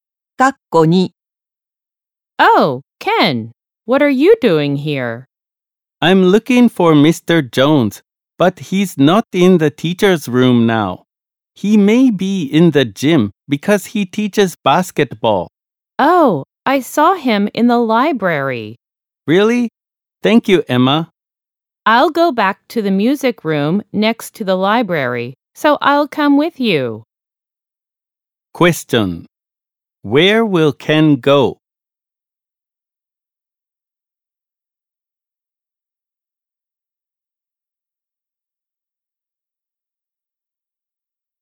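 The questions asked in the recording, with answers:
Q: Where will Ken go?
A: To the library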